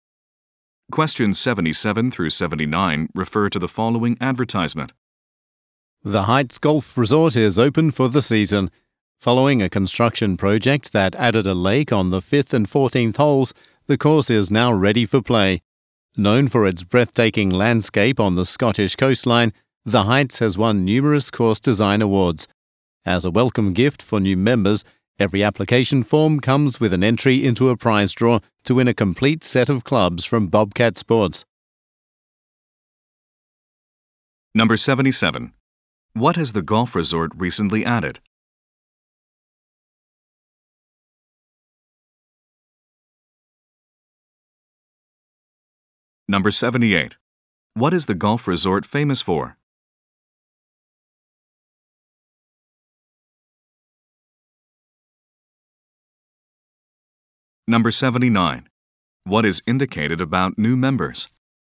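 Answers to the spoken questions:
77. A lake
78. Its breathtaking landscape on the Scottish coastline
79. They are entered into a prize draw for golf clubs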